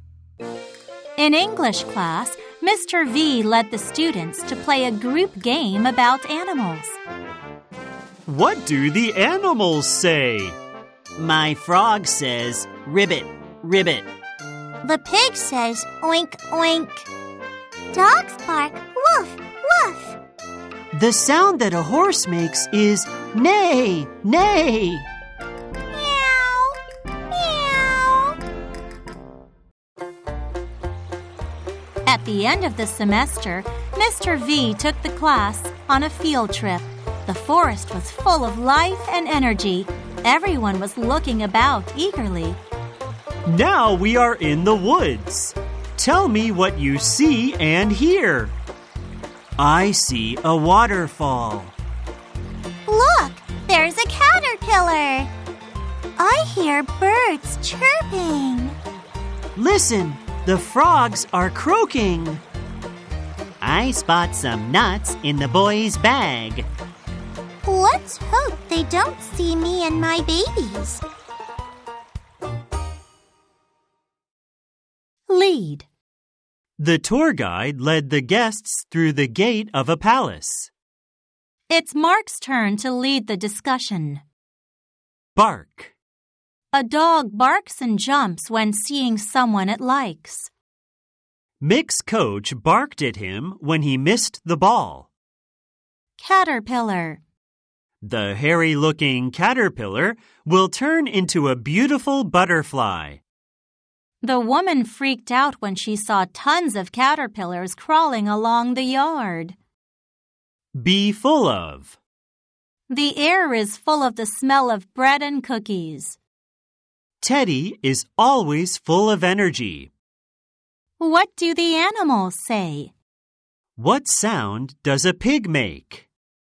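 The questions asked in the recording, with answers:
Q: What sound does a pig make?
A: Oink, oink.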